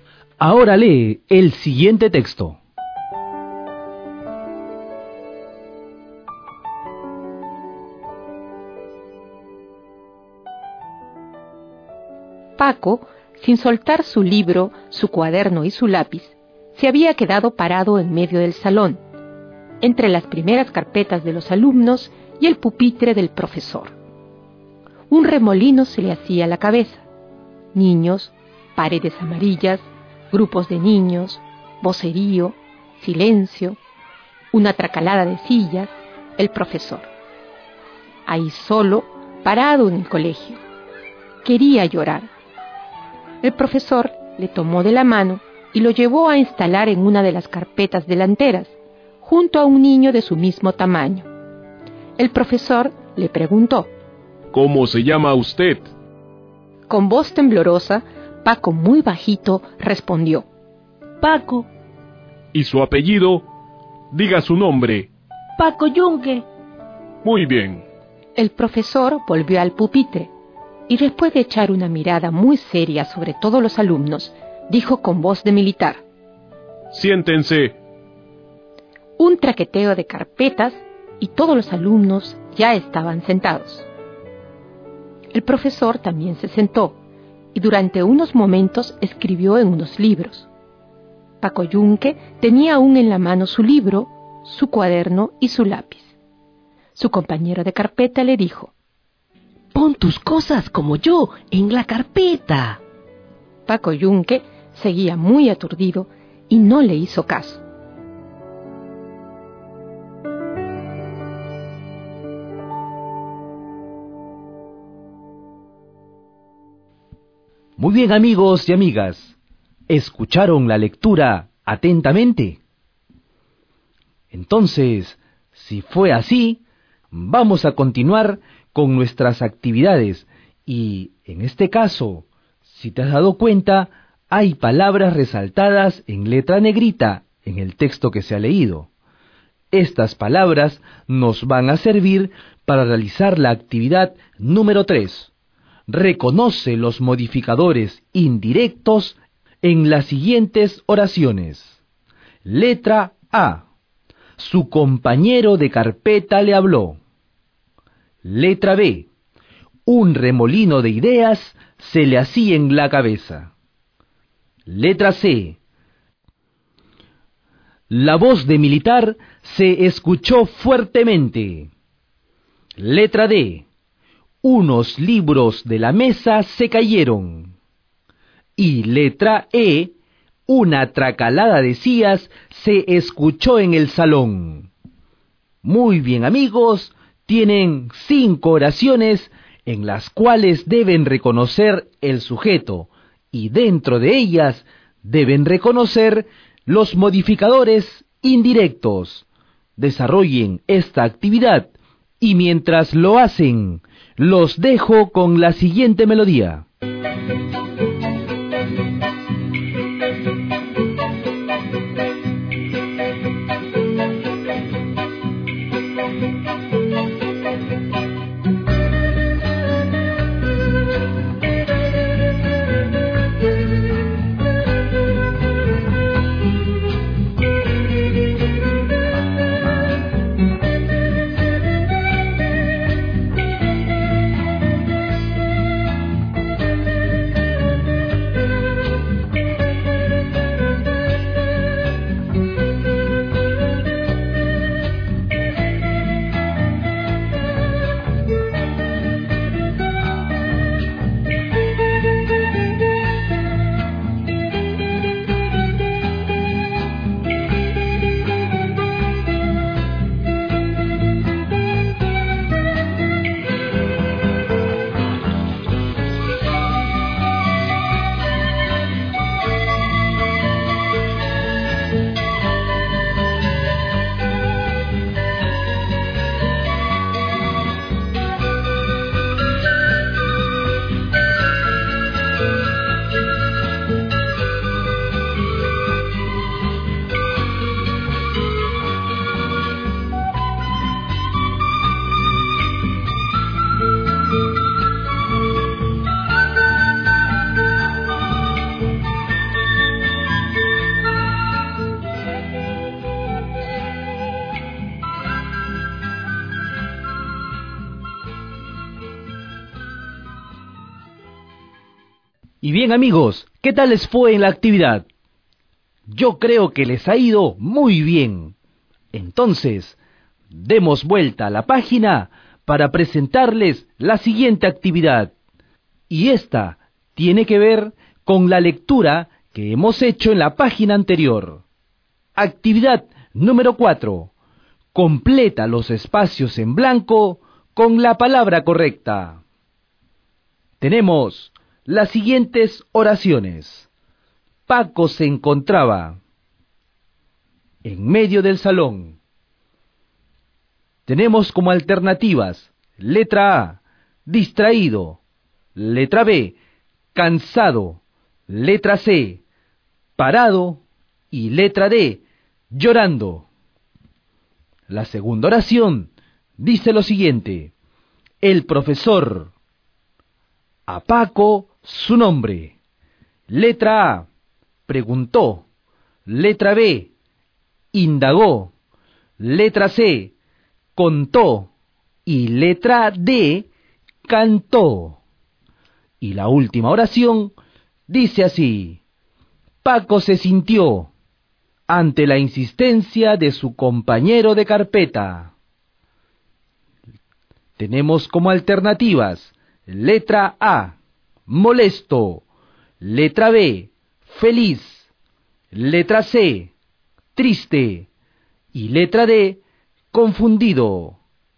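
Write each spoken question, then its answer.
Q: Paco se encontraba en medio del salón.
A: C: parado

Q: el profesor, a Paco su nombre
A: A: preguntó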